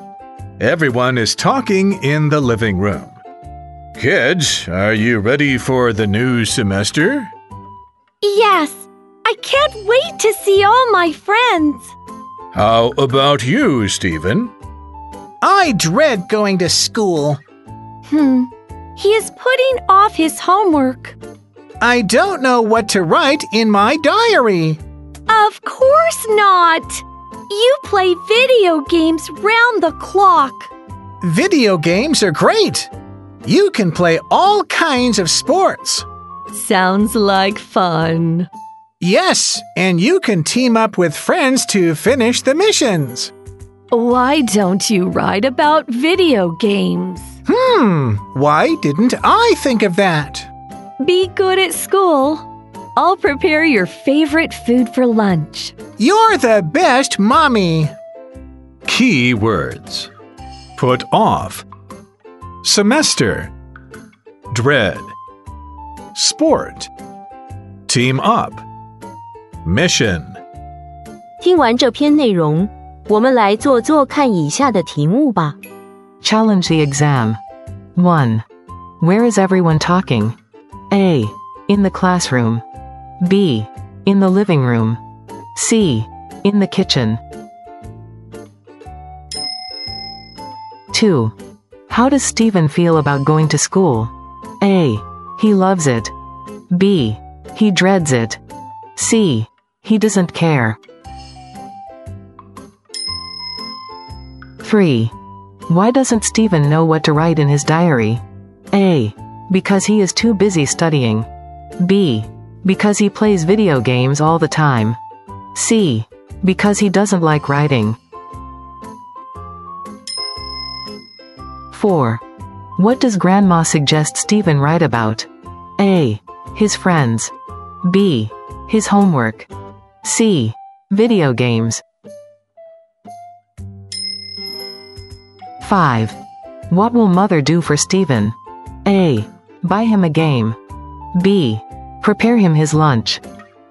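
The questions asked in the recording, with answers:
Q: Where is everyone talking?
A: B: In the living room.

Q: How does Stephen feel about going to school?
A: B: He dreads it.

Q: Why doesn't Stephen know what to write in his diary?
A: B: Because he plays video games all the time.

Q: What does Grandma suggest Stephen write about?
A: C. Video games.

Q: What will Mother do for Stephen?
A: B: Prepare him his lunch.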